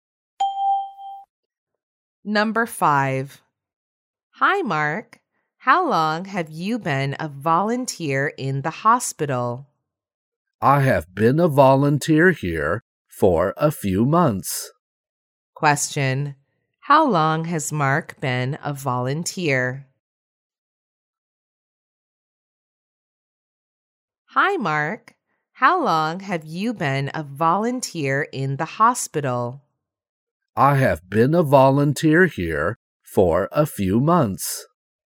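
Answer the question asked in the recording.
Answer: For a few months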